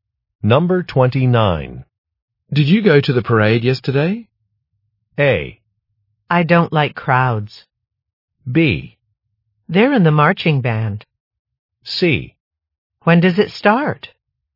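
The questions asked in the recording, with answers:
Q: Did you go to the parade yesterday?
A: A: I don't like crowds.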